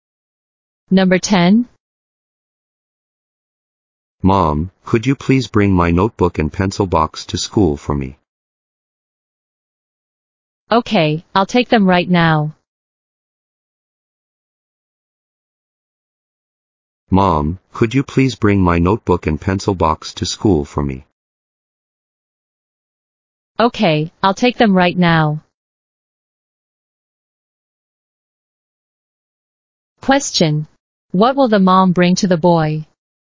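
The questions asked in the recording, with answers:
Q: What will the mom bring to the boy?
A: His notebook and pencil box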